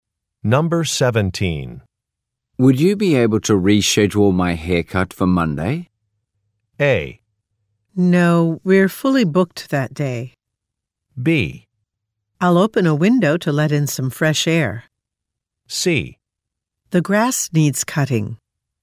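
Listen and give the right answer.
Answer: A: No, we're fully booked that day.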